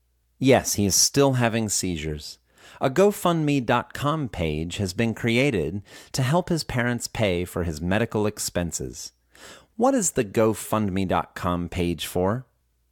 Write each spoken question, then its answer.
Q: What is the GoFundMe.com page for?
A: The GoFundMe.com page is to help his parents pay for his medical expenses.